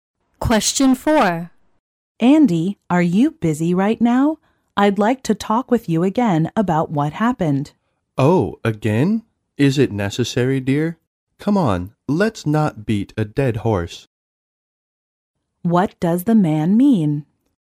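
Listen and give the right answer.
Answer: He doesn't want to talk about it again.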